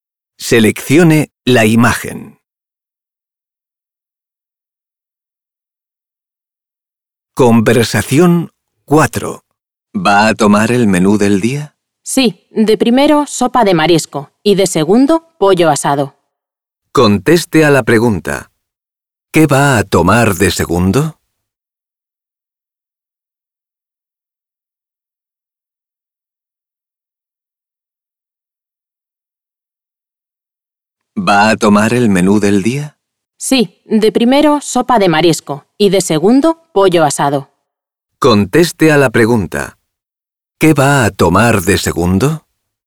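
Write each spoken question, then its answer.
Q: ¿Qué va a tomar de segundo?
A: Pollo asado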